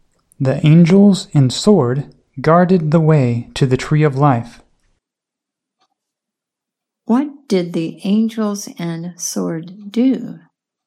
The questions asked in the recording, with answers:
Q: What did the angels and sword do?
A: The angels and sword guarded.